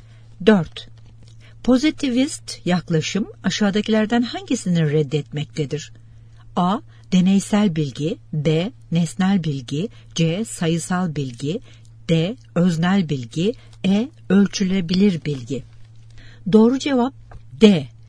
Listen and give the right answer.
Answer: Doğru cevap D.